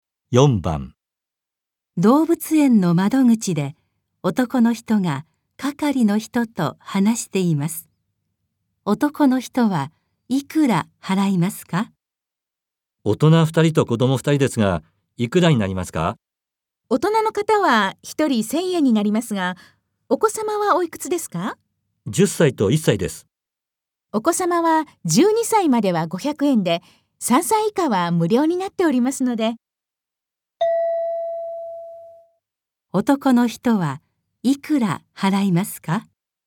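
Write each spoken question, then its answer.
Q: 男の人はいくら払いますか?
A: 2500円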